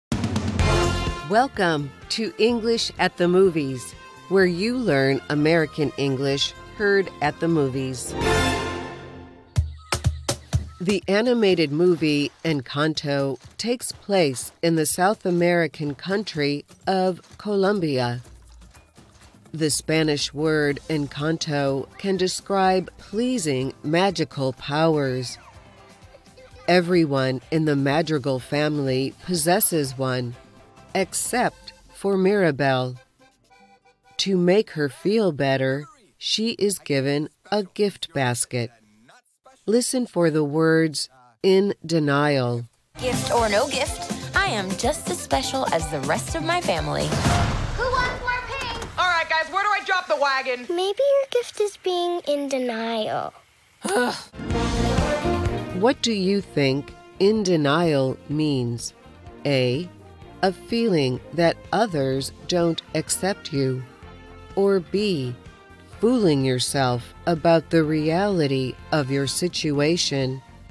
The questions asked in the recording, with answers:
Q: What do you think in denial means?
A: The answer is B. In denial is fooling yourself about the reality of your situation.